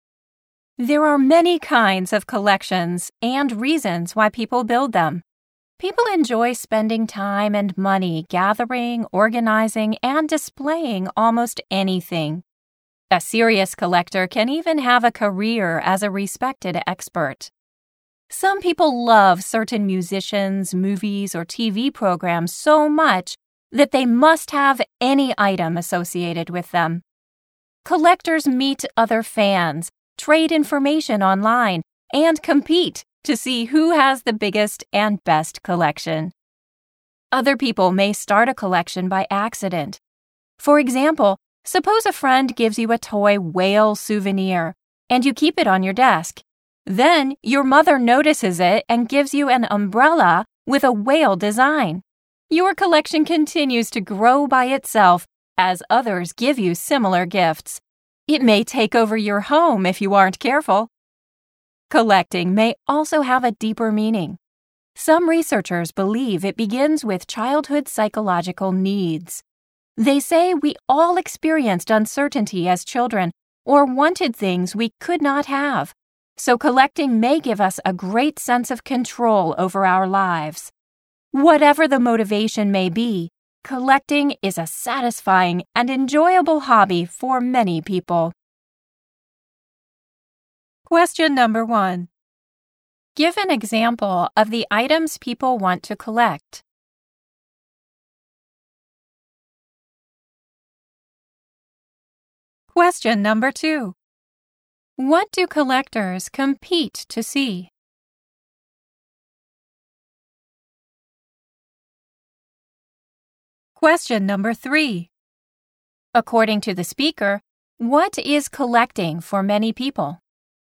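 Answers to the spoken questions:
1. Any item associated with musicians, movies, or TV programs they love
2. Who has the biggest and best collection
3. A satisfying and enjoyable hobby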